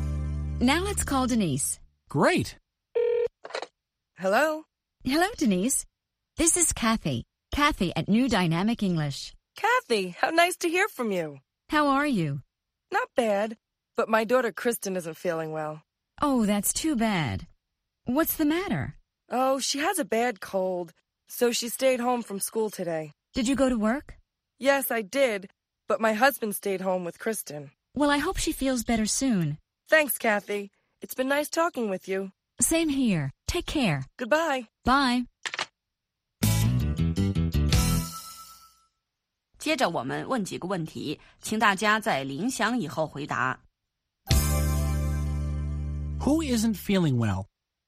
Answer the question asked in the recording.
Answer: Denise's daughter, Kristen, isn't feeling well.